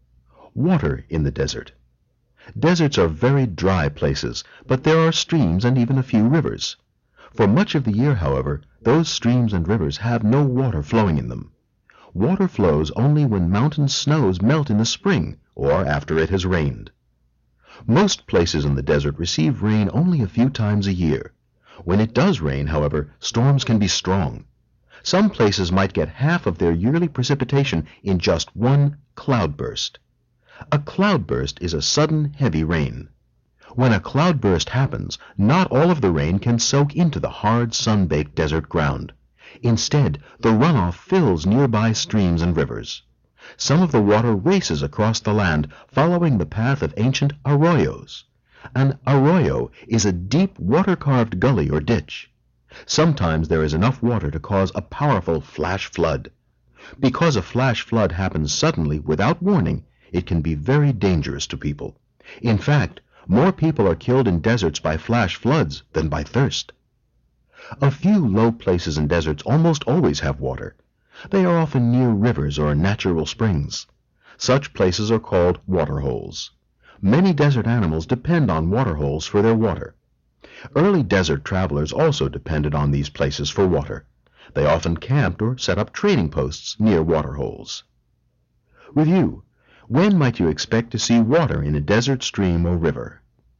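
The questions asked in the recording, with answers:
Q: When might you expect to see water in a desert stream or river?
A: When mountain snows melt in the spring or after it has rained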